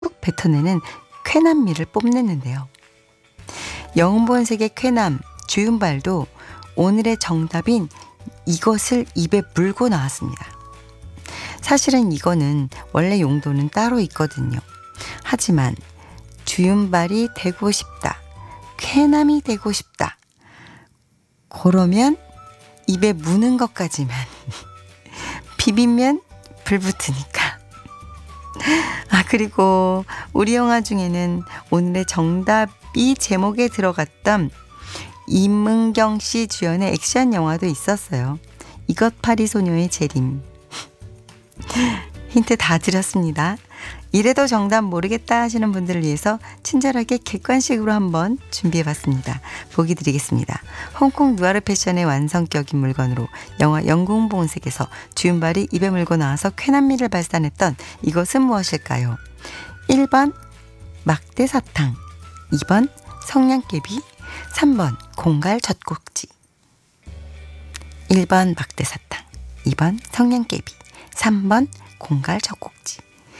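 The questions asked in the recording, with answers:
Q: 홍콩 누아르 패션의 완성격인 물건으로 영화 영궁본색에서 주윤발이 입에 물고 나와서 쾌남미를 발산했던 이것은 무엇일까요?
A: 2: 성냥개비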